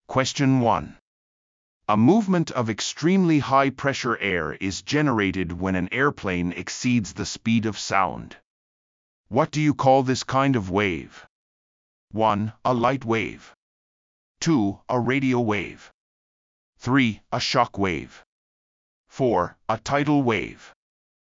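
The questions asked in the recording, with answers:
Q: What do you call this kind of wave?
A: 3: A shock wave.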